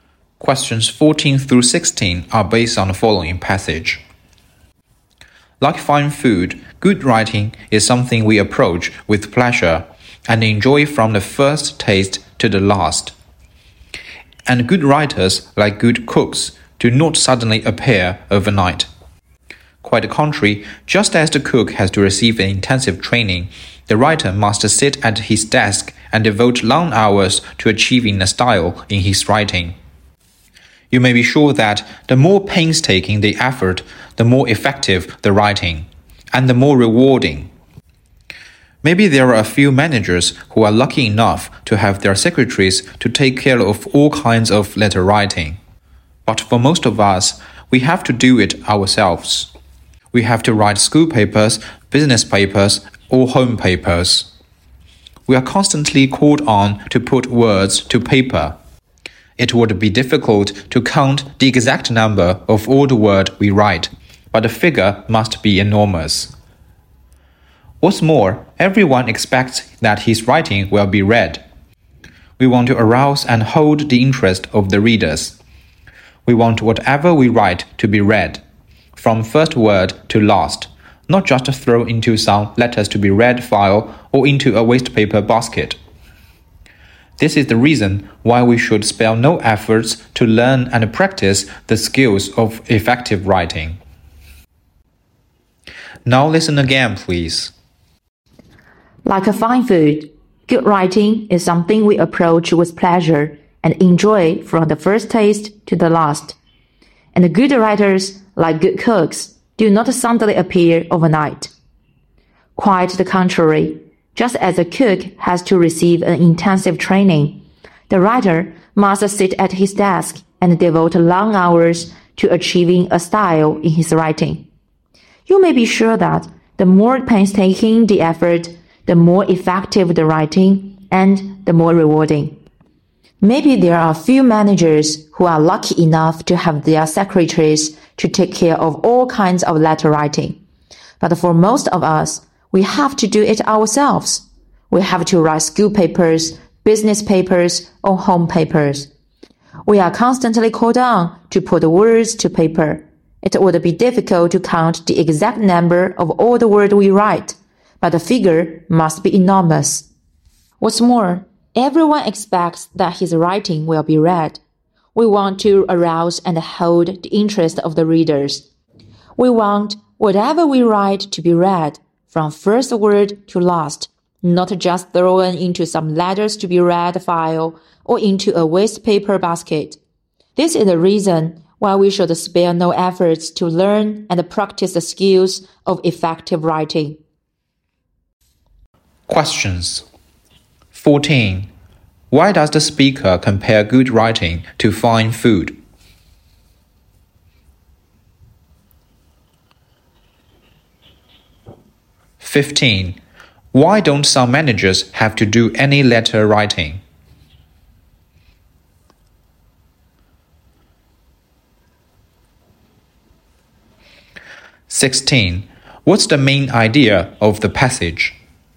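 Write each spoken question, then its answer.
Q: Why don't some managers have to do any letter writing?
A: Their secretaries do it for them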